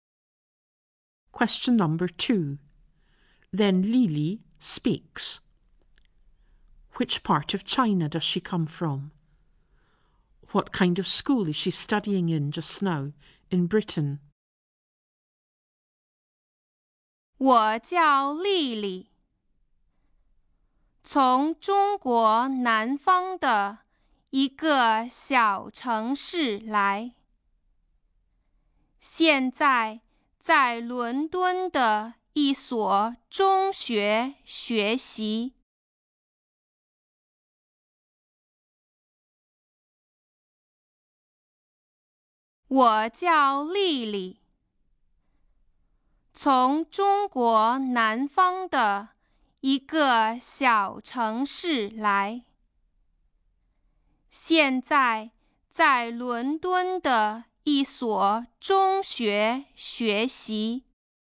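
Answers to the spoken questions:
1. A small city in the south of China
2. A secondary school in London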